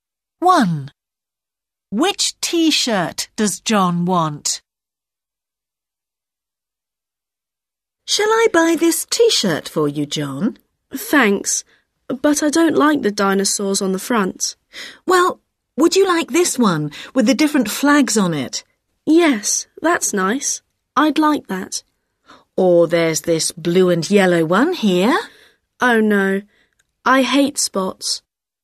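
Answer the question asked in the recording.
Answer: The one with the different flags on it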